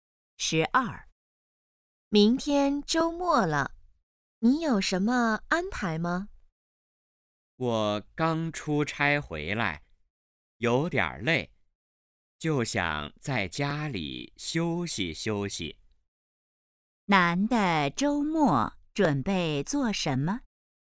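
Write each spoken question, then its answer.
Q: 男的周末准备做什么?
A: 在家休息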